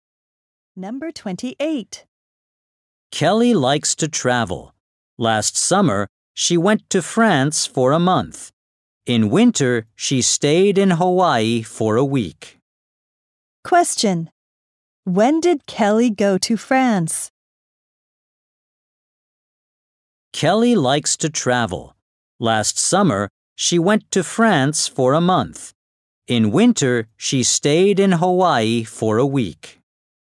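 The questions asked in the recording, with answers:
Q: Question. When did Kelly go to France?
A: Last summer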